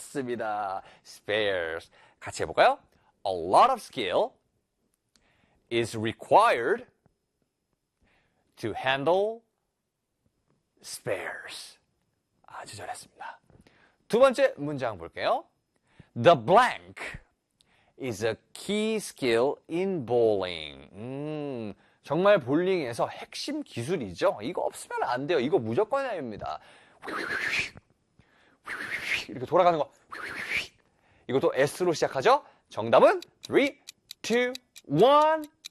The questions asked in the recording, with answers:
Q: The blank is a key skill in bowling.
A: Spin!